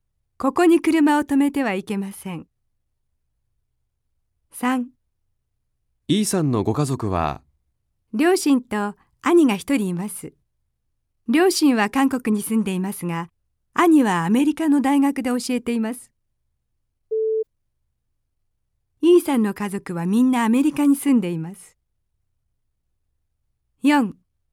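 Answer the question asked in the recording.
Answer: 正しくない(×)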